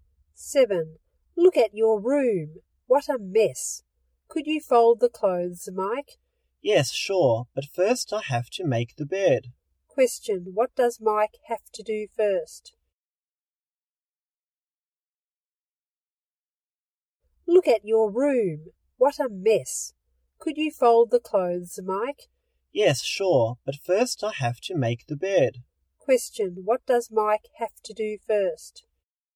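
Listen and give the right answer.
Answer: Make the bed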